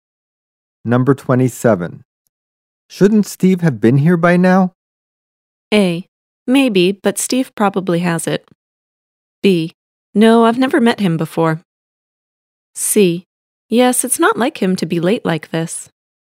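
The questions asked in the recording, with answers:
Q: Shouldn't Steve have been here by now?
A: C: Yes, it's not like him to be late like this.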